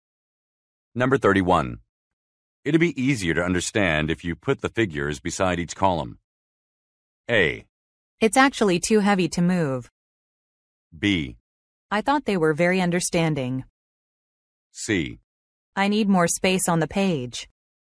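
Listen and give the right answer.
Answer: C: I need more space on the page.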